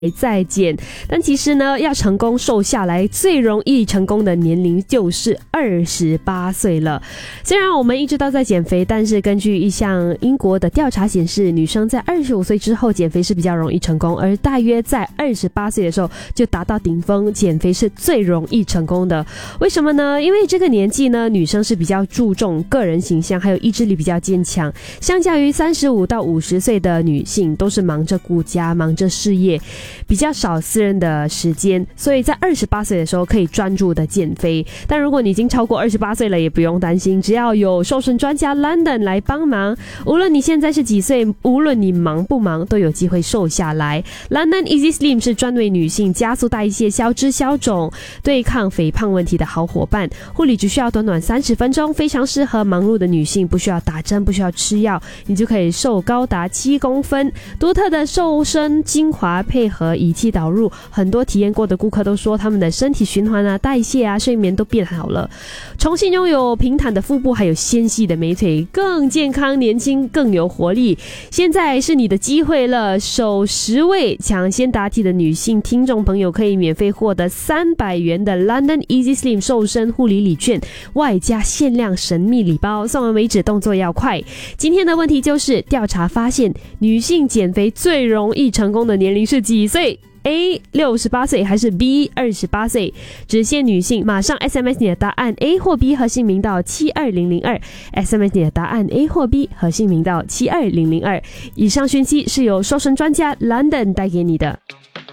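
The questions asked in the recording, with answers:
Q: 今天的问题就是,调查发现女性减肥最容易成功的年龄是几岁?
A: B: 28岁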